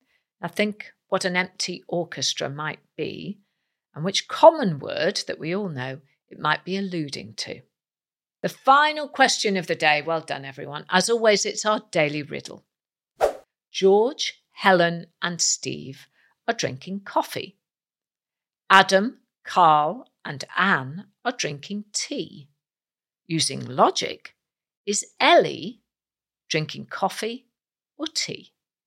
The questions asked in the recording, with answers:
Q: Using logic, is Ellie drinking coffee or tea?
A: Ellie is drinking coffee.